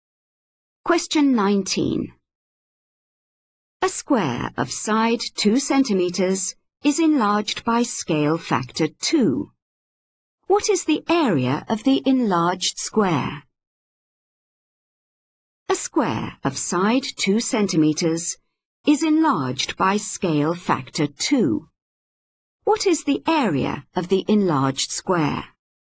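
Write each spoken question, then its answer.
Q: What is the area of the enlarged square?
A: 16 square centimeters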